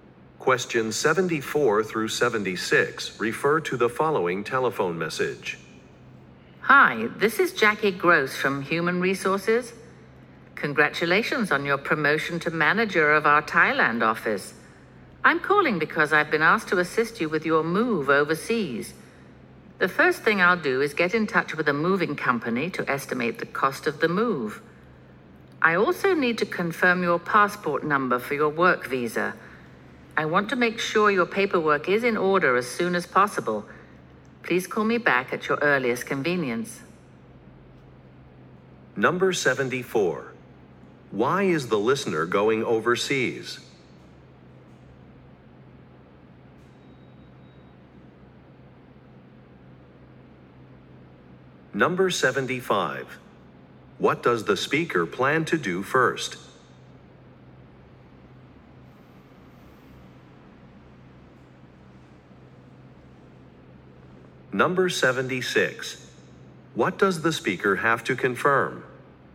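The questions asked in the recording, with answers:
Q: Why is the listener going overseas?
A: He was promoted to manager of the Thailand office

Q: What does the speaker plan to do first?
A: Contact a moving company to estimate the cost of the move

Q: What does the speaker have to confirm?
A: The listener's passport number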